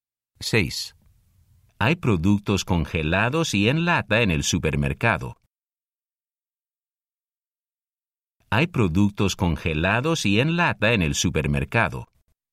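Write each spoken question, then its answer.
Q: Hay productos congelados y en lata en el supermercado.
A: sí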